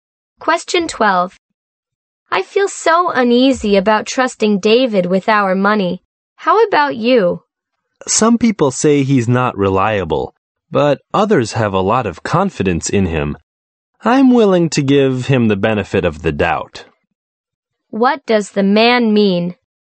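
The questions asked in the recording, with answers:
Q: What does the man mean?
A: He is willing to trust David.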